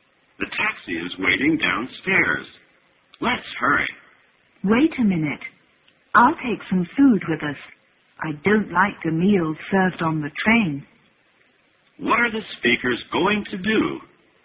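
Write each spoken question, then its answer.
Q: What are the speakers going to do?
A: Take a taxi to catch a train (go on a train trip).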